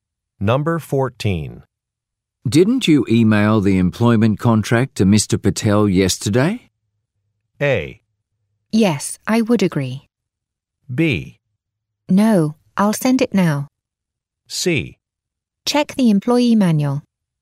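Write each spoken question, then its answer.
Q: Didn't you email the employment contract to Mr. Patel yesterday?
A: B: No, I'll send it now.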